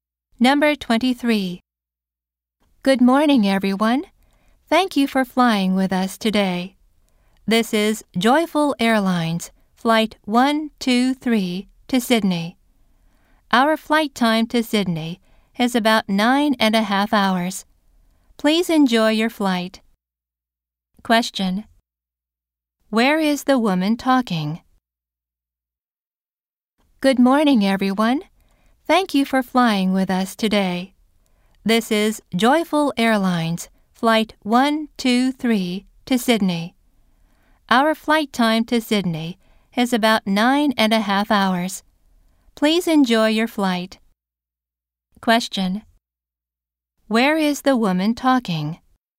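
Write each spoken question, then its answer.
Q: Where is the woman talking?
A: On an airplane.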